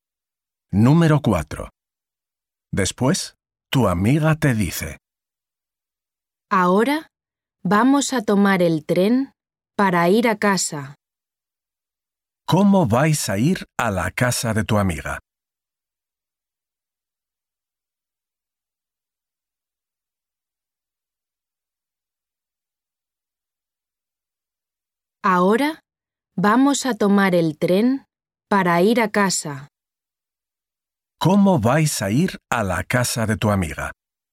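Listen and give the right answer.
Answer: en tren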